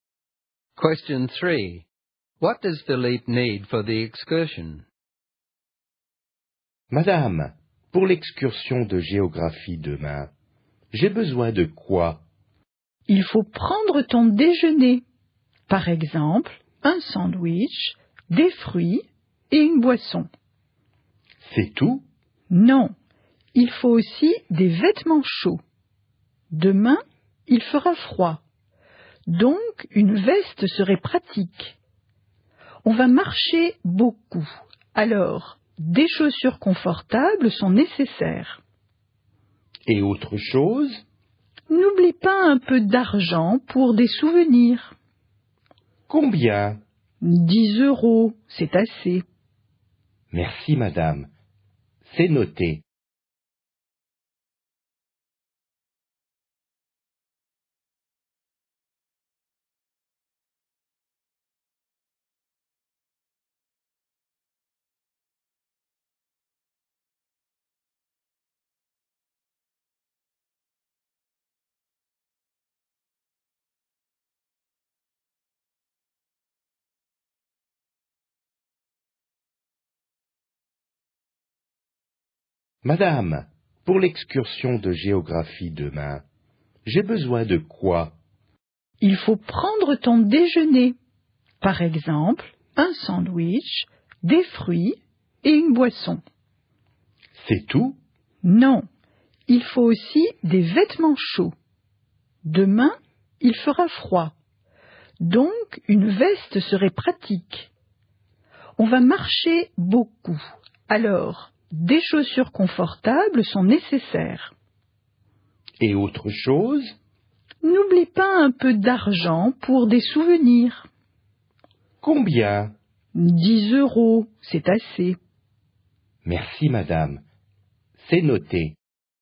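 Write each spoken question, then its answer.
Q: What does Philippe need for the excursion?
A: Lunch (sandwich, fruit, drink), warm clothes/a jacket, comfortable shoes and 10 euros for souvenirs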